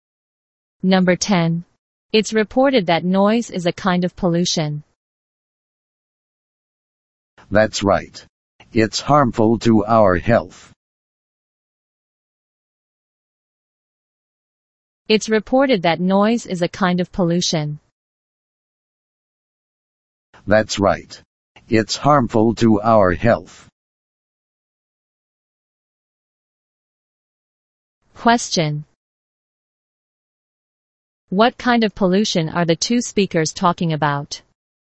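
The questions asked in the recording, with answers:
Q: What kind of pollution are the two speakers talking about?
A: Noise pollution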